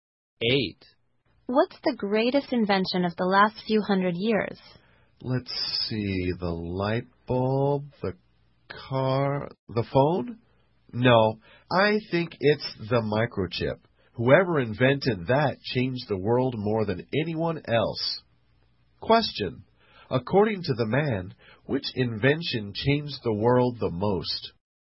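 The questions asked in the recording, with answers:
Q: According to the man, which invention changed the world the most?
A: The microchip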